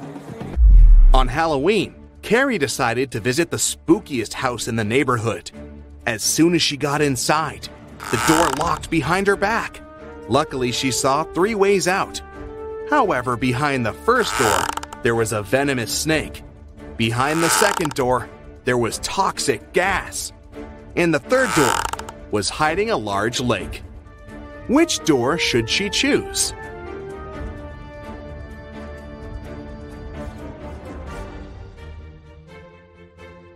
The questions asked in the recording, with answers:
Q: Which door should she choose?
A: The last door. It's just a lake.